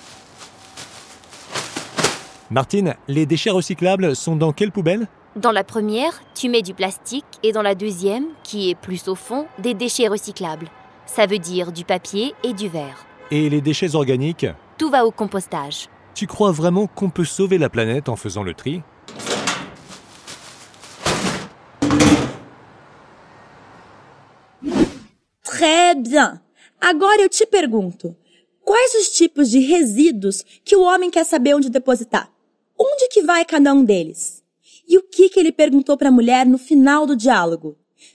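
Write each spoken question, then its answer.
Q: quais os tipos de resíduos que o homem quer saber onde depositar?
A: Os resíduos recicláveis e os resíduos orgânicos

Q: Onde que vai cada um deles?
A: Os recicláveis (papel e vidro) vão na segunda lixeira, mais no fundo; os orgânicos vão todos para a compostagem

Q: E o que que ele perguntou para a mulher no final do diálogo?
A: Você acredita mesmo que a gente pode salvar o planeta separando o lixo?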